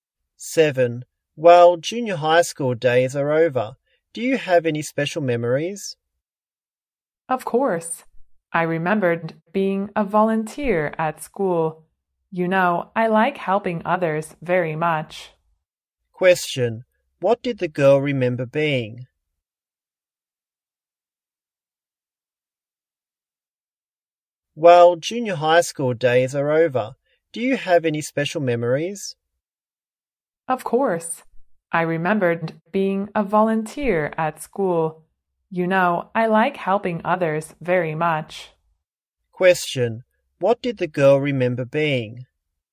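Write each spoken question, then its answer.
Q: What did the girl remember being?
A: A volunteer at school.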